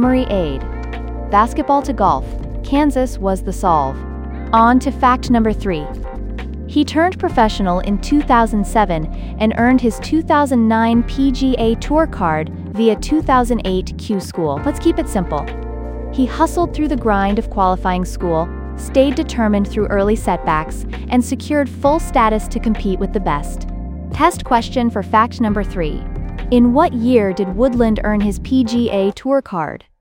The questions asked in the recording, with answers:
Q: In what year did Woodland earn his PGA Tour card?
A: 2009.